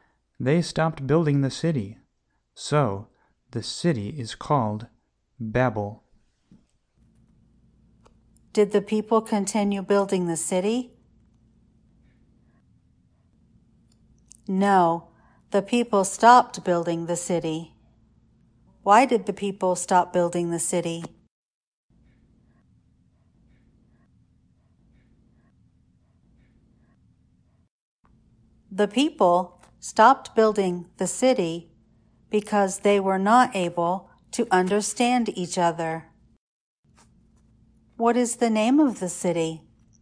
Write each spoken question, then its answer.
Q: What is the name of the city?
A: The name of the city is Babel.